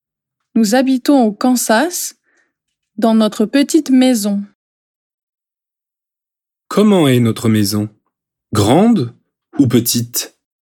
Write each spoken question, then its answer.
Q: Comment est notre maison?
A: Petite. Notre maison est petite.